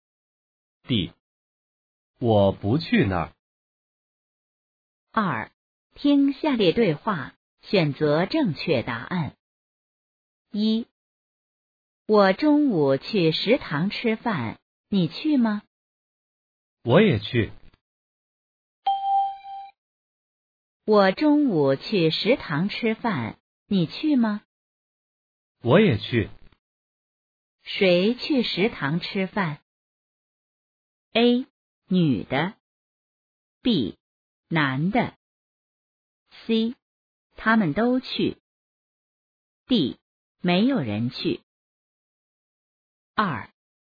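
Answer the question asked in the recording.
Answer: C: 他们都去。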